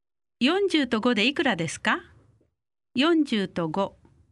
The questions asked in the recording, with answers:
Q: 40と5でいくらですか40と5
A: 45 40と5で45